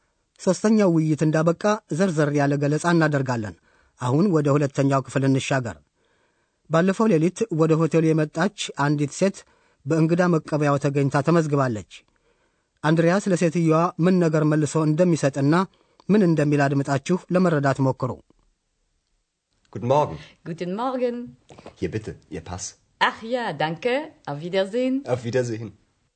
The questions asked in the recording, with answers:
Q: አንድሪያስ ለሴትዮዋ ምን ነገር መልሶ እንደሚሰጥና ምን እንደሚል አድምጣችሁ ለመረዳት ሞክሩ።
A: አንድሪያስ ባለፈው ሌሊት ለምዝገባ ወስዶ የነበረውን ፓስፖርት ይሄውሎ በማለት ለሴትዮዋ መልሶ ይሰጣል።